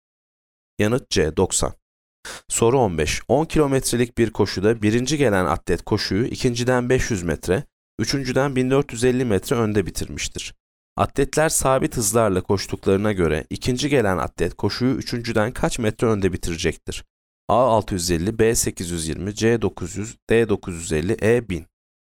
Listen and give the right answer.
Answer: Yanıt E 1000.